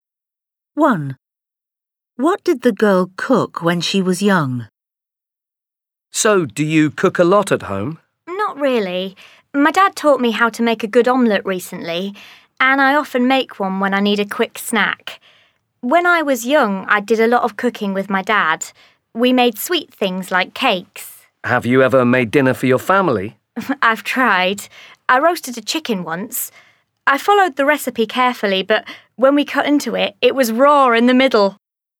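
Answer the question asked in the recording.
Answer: sweet things like cakes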